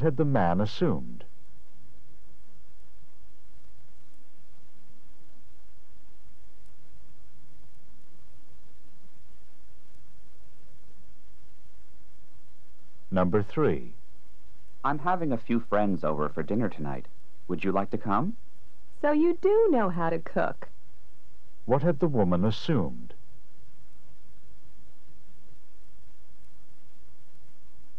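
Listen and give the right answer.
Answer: That the man couldn't cook.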